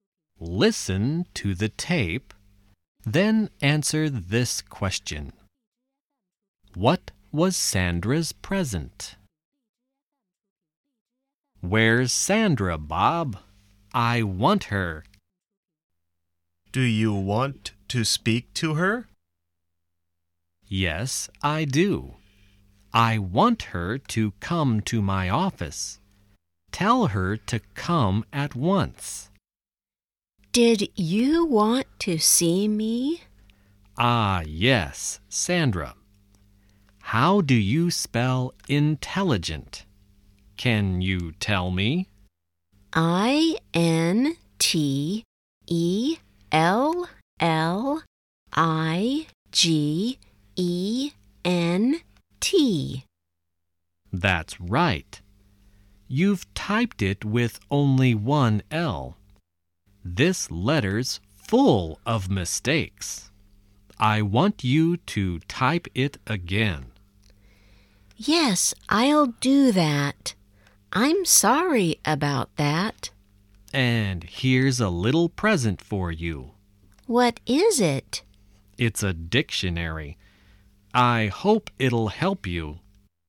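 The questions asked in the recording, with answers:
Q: What was Sandra's present?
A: A dictionary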